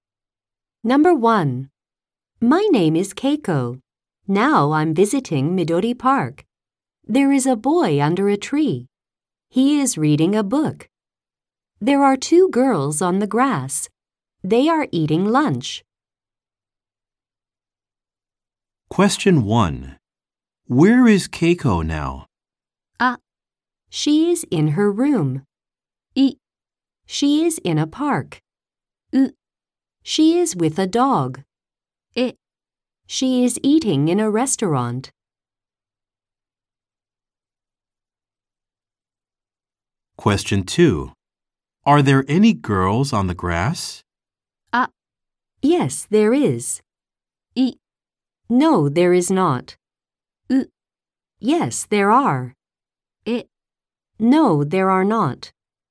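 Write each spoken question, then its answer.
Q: Where is Keiko now?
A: い: She is in a park.

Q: Are there any girls on the grass?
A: う: Yes, there are.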